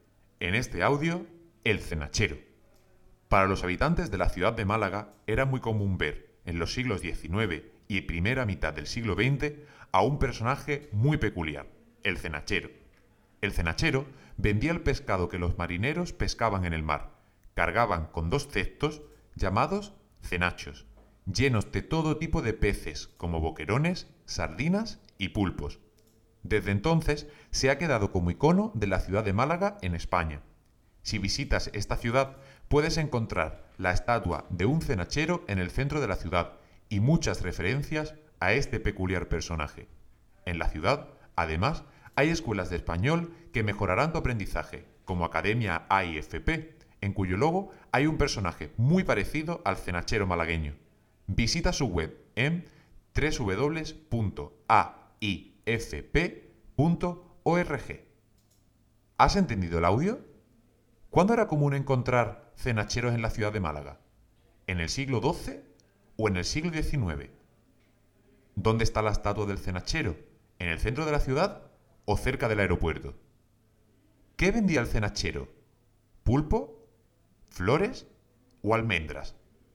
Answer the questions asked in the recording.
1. en el siglo XIX
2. en el centro
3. vendía pulpos, además de otros peces